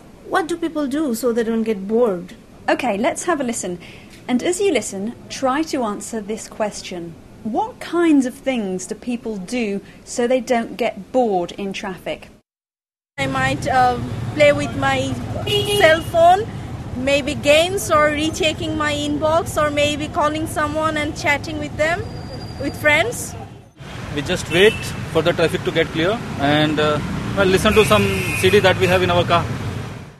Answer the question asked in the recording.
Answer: Well, the girl says she plays with her cell phone.